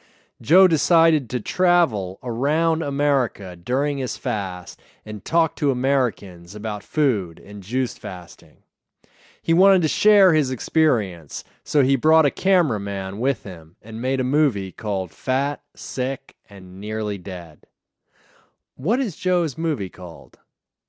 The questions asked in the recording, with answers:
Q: What is Joe's movie called?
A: Joe's movie is called Fat, Sick, and Nearly Dead.